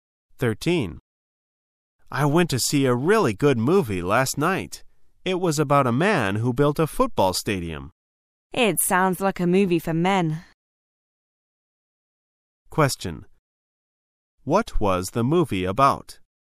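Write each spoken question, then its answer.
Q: What was the movie about?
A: A man who built a football stadium

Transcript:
[解析] M: I went to see a really good movie last night. It was about a man who built a football stadium. W: It sounds like a movie for men. Q: What was the movie about?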